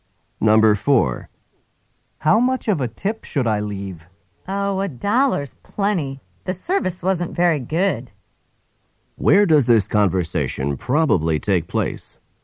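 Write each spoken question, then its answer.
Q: Where does this conversation probably take place?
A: In a restaurant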